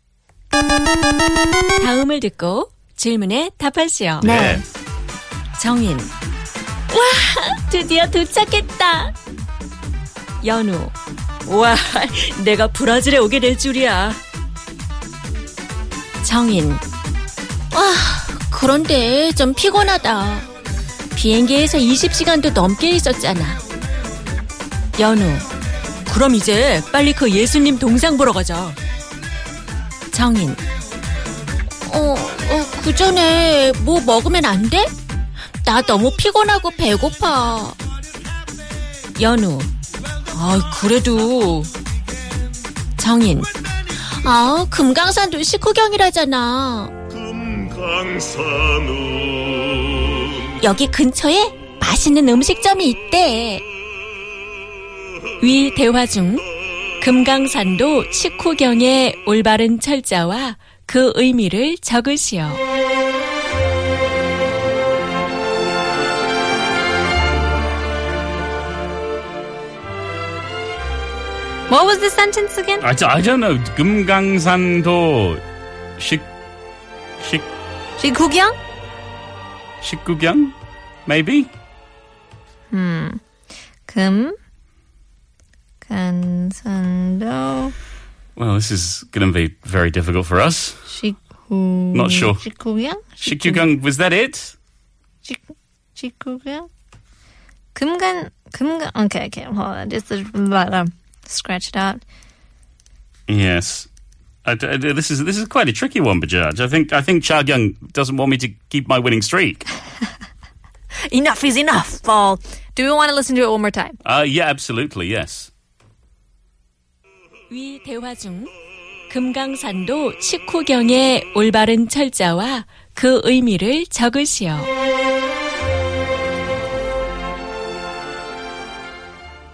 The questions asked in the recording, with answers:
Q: 위 대화 중 금강산도 식후경의 올바른 철자와 그 의미를 적으시오.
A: And the meaning is that, you should eat before you go to 금강 Mountain.